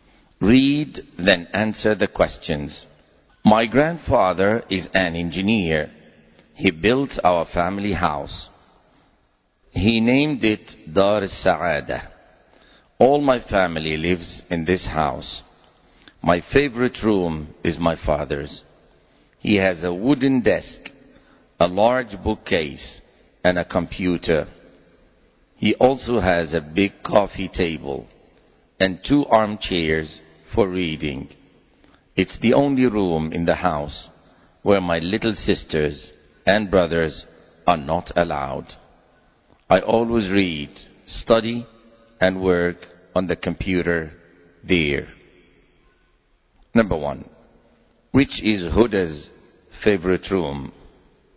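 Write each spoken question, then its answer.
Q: Number one, which is Huda's favorite room?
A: Her father's room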